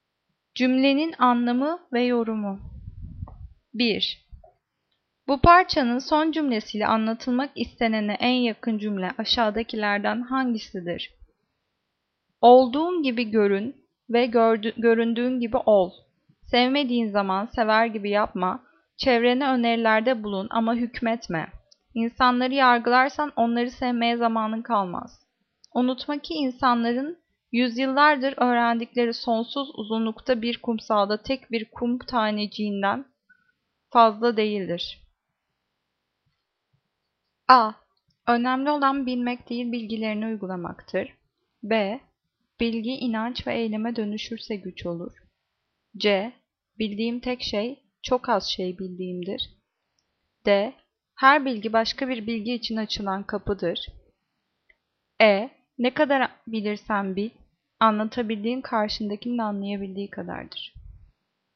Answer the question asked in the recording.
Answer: Cevap C. Bildiğim tek şey, çok az şey bildiğimdir.